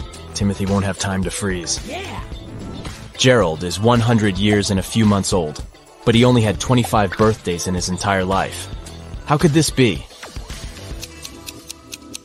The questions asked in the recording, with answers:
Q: How could this be?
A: The man was born on February 29th, so his birthday only takes place once every four years.